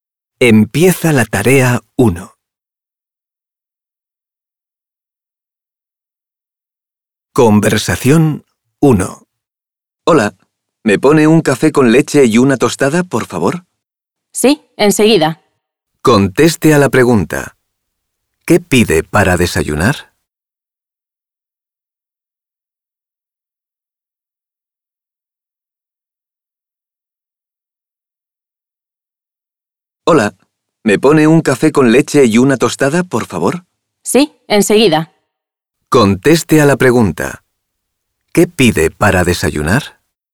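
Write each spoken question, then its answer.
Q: ¿Qué pide para desayunar?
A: Un café con leche y una tostada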